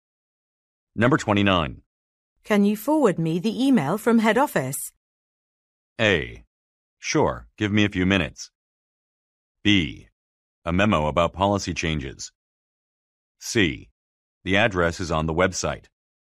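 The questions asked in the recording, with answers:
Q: Can you forward me the email from head office?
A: A: Sure, give me a few minutes.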